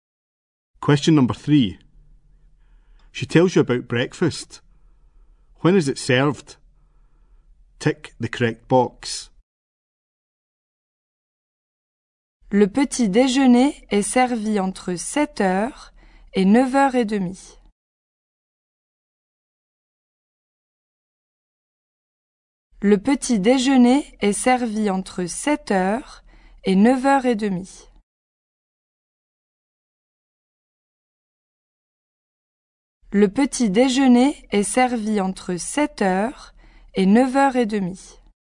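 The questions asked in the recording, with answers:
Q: When is it served?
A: Between 7:00 and 9:30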